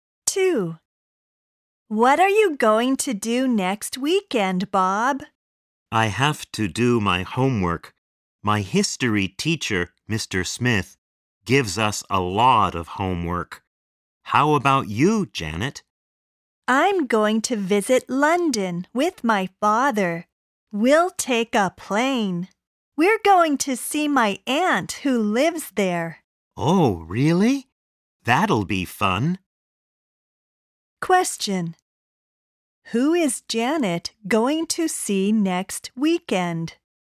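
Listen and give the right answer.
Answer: Her aunt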